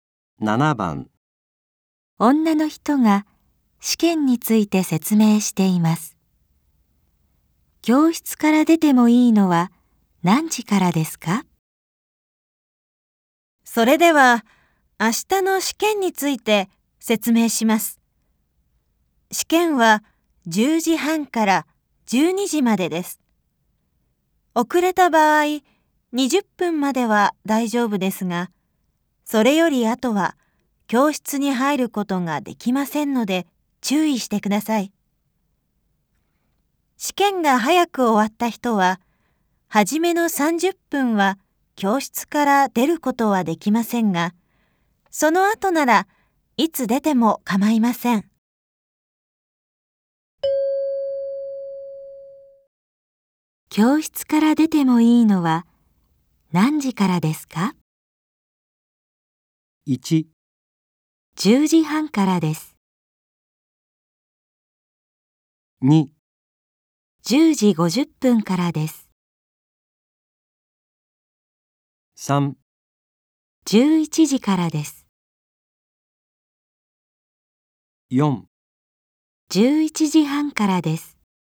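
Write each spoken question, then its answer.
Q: 教室から出てもいいのは何時からですか?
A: 3: 11時からです。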